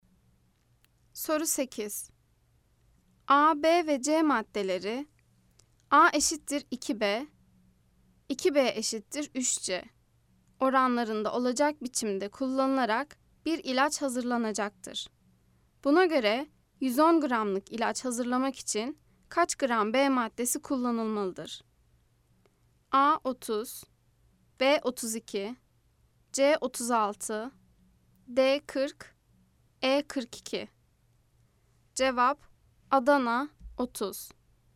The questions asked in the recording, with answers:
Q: Buna göre 110 gramlık ilaç hazırlamak için kaç gram B maddesi kullanılmalıdır?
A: Cevap Adana 30.